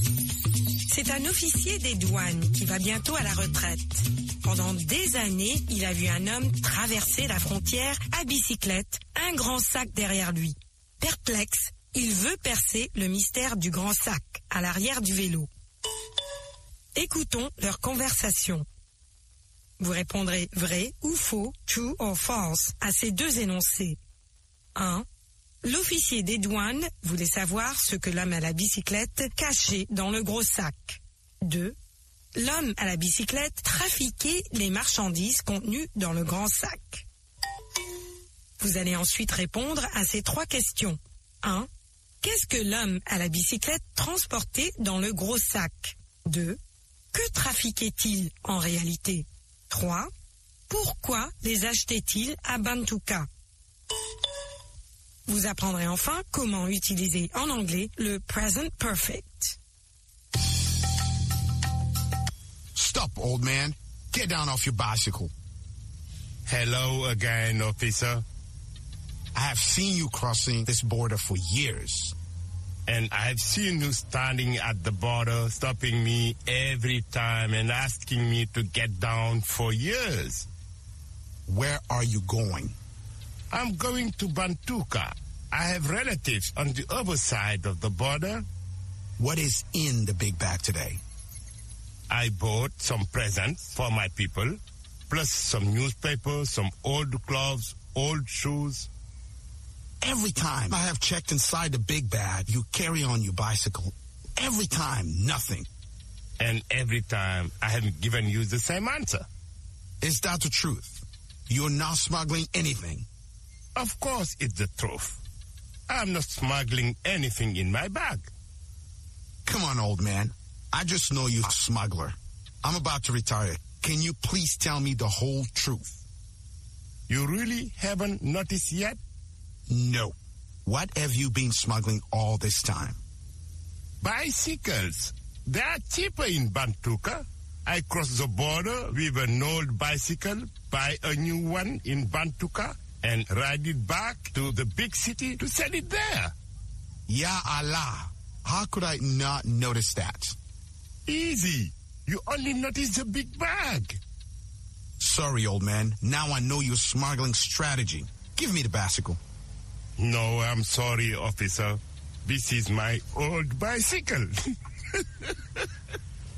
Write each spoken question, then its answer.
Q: L'officier des douanes voulait savoir ce que l'homme à la bicyclette cachait dans le gros sac.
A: L'énoncé 1 est vrai.

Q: L'homme à la bicyclette trafiquait les marchandises contenues dans le grand sac.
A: L'énoncé 2 est faux.

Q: Qu'est-ce que l'homme à la bicyclette transportait dans le gros sac?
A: Des cadeaux, des journaux, de vieux habits et de vieilles chaussures.

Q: Que trafiquait-il en réalité?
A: Des bicyclettes.

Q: Pourquoi les achetait-il à Bantuka?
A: Parce qu'elles coûtent moins cher à Bantuka.